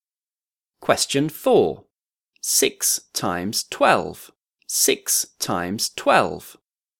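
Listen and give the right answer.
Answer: 72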